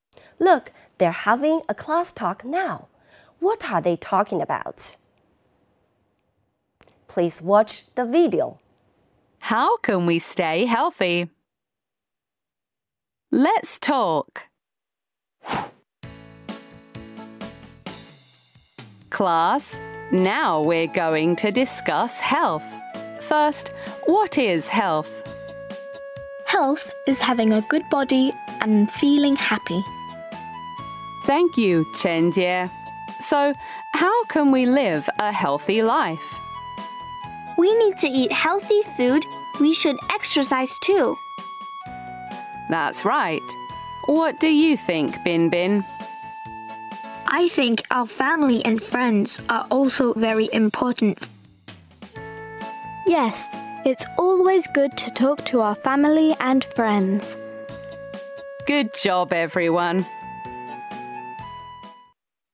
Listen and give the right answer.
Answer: They are talking about what is health and how can we live a healthy life.